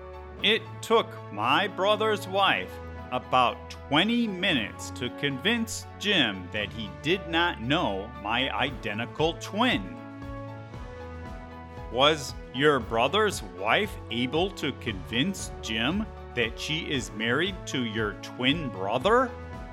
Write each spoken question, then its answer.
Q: Was your brother's wife able to convince Jim that she is married to your twin brother?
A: Yes. My brother's wife was able to convince Jim, but it took her about 20 minutes to do so.